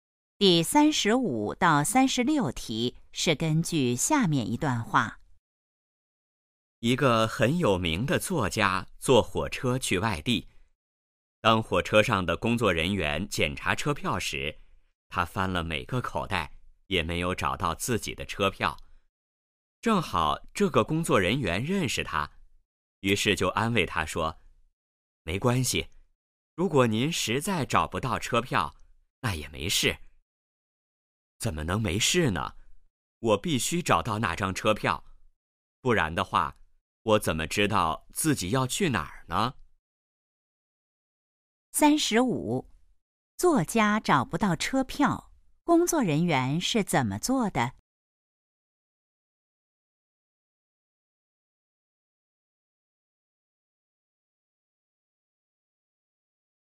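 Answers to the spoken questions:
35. 安慰他说没关系
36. 不知道自己要去哪儿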